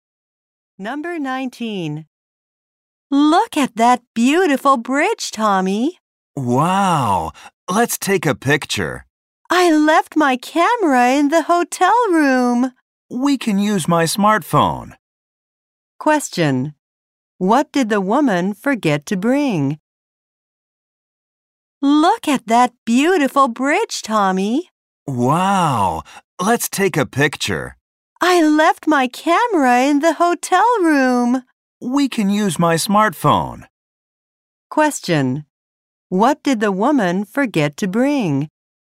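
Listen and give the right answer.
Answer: Her camera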